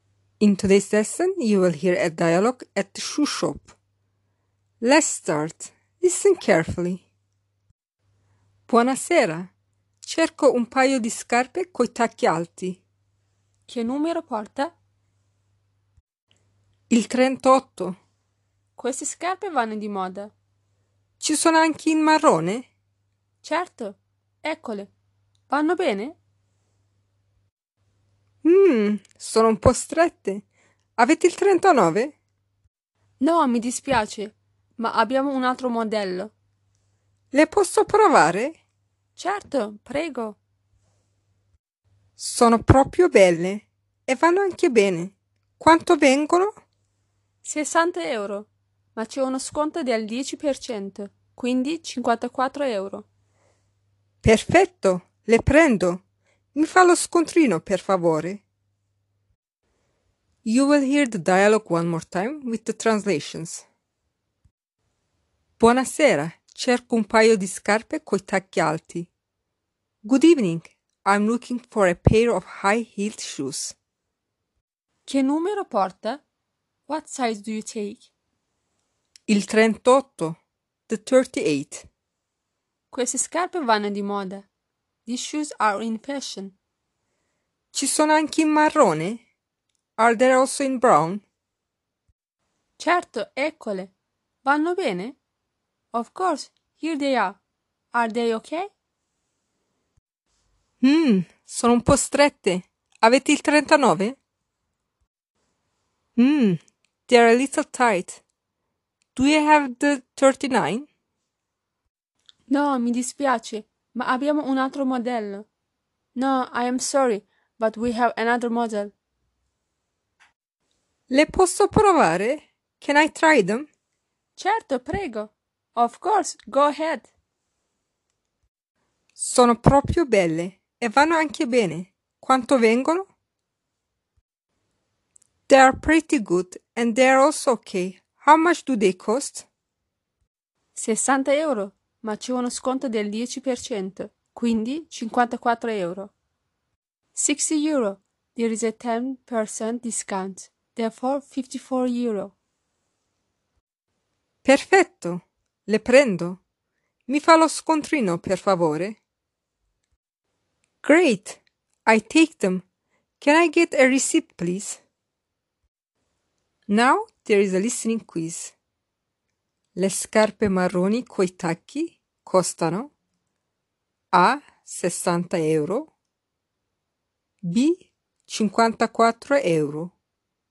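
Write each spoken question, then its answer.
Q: Le scarpe marroni coi tacchi costano A 60 euro, B 54 euro.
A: B: 54 euro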